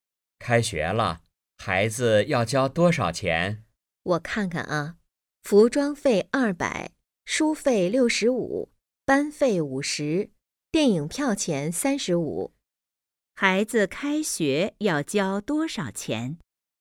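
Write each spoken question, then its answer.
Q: 孩子开学要交多少钱?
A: 350元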